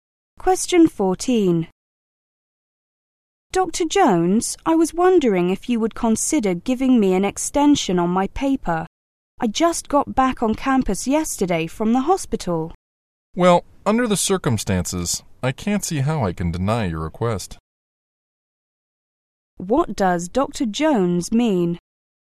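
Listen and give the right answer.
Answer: He will give the student an extension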